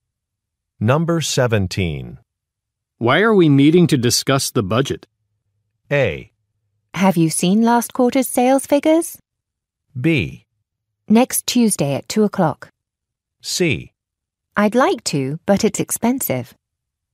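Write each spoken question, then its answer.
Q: Why are we meeting to discuss the budget?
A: A: Have you seen last quarter's sales figures?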